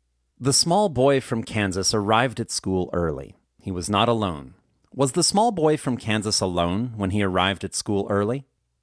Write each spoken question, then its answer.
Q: Was the small boy from Kansas alone when he arrived at school early?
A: No, the small boy from Kansas wasn't alone when he arrived at school early.